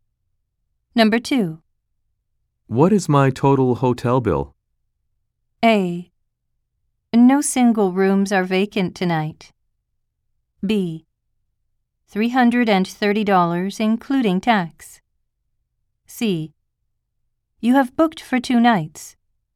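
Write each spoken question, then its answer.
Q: What is my total hotel bill?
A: B: $330, including tax.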